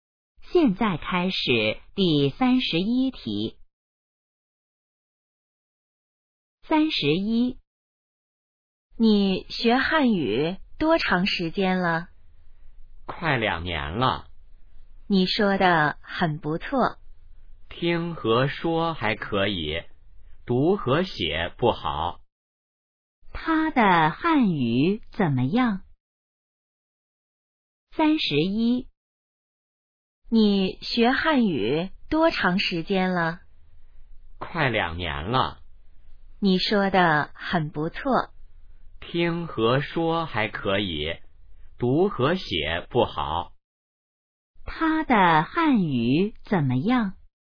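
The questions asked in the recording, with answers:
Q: 他的汉语怎么样?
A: 听和说还可以,读和写不好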